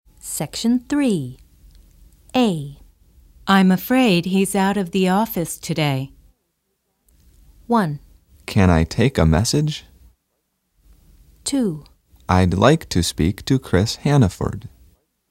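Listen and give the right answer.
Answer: 2: I'd like to speak to Chris Hannaford.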